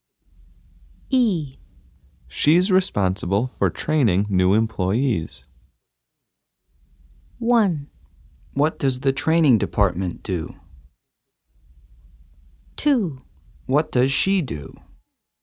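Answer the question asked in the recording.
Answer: 2: What does she do?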